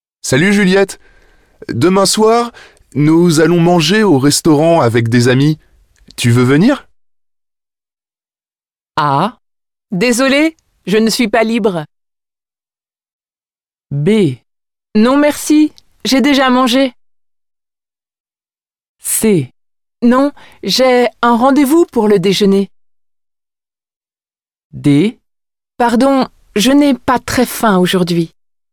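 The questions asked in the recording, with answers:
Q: Tu veux venir?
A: A: Désolée, je ne suis pas libre.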